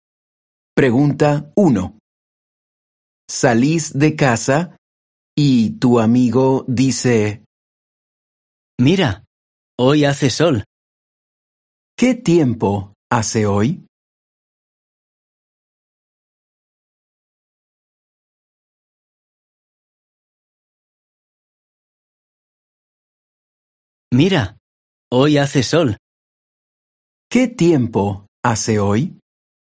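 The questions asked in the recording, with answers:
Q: ¿Qué tiempo hace hoy?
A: Hace sol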